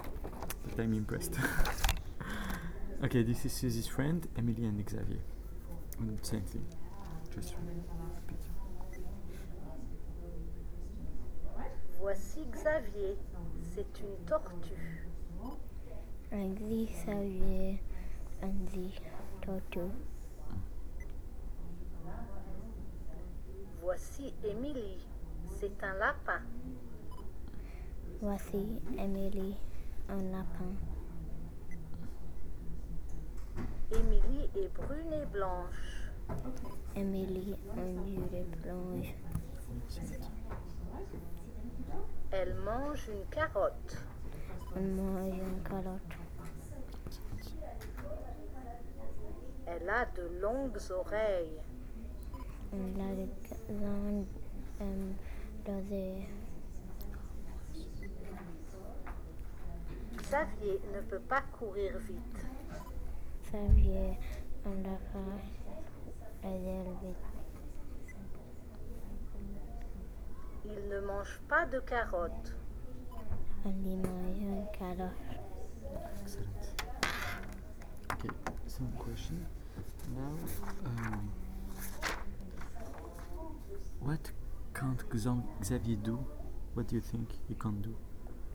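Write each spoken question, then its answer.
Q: what can't Xavier do? What do you think he can't do?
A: He can't run fast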